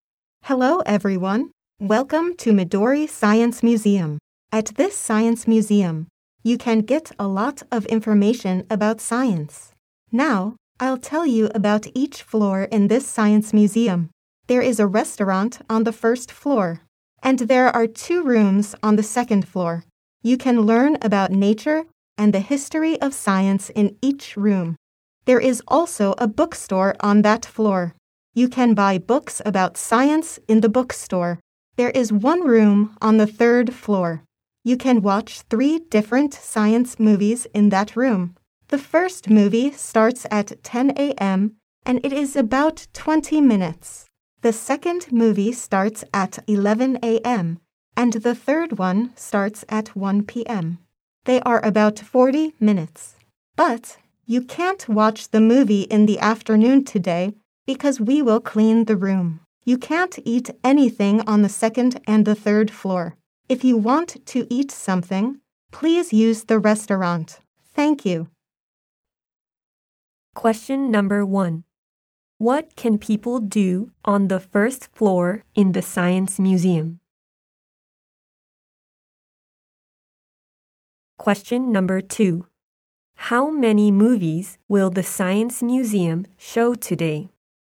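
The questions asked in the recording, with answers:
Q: What can people do on the first floor in the science museum?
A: They can eat at the restaurant.

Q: How many movies will the science museum show today?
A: Two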